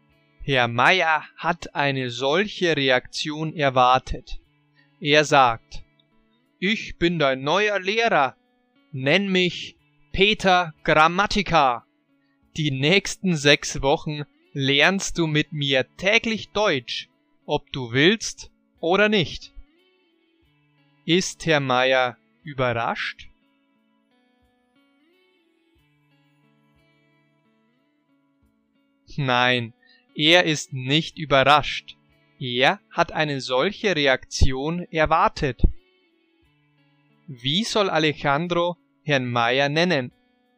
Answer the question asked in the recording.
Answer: Peter Grammatica.